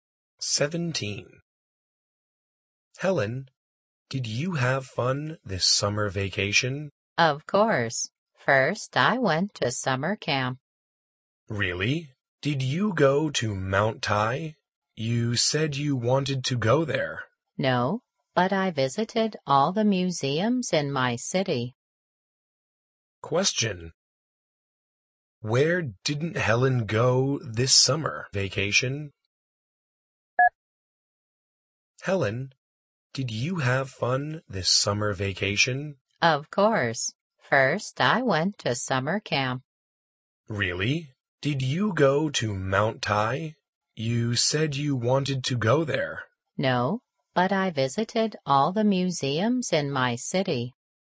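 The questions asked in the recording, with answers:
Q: Where didn't Helen go this summer vacation?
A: Mount Tai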